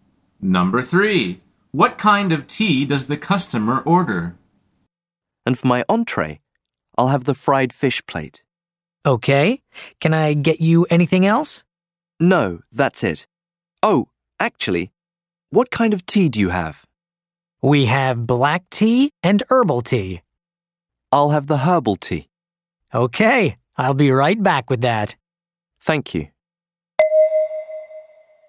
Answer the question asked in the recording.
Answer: The answer is herbal tea.